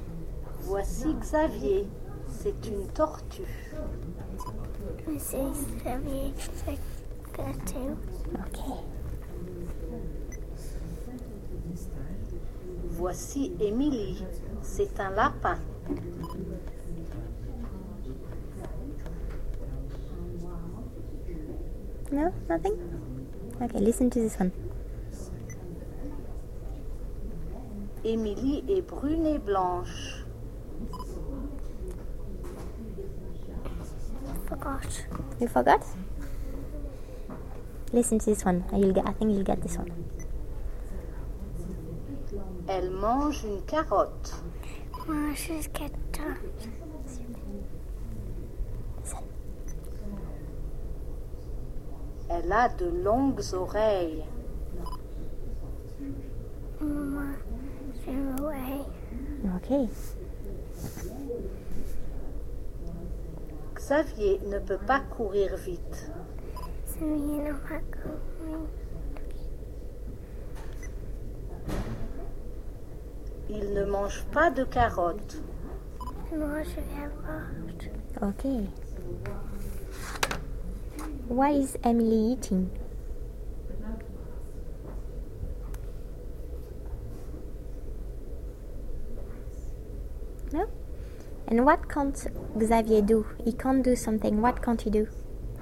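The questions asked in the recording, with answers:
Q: Why is Emily eating?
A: A carrot

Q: And what can't Xavier do?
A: Run fast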